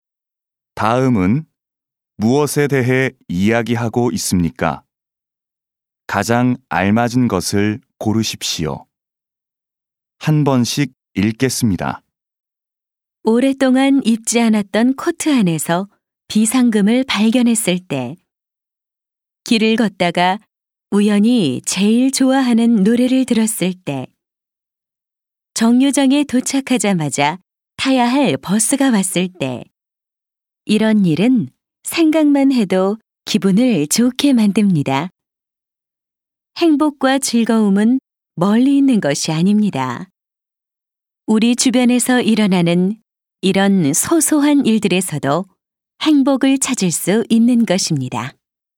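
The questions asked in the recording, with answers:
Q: 다음은 무엇에 대해 이야기하고 있습니까?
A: 일상의 소소한 일에서 찾는 행복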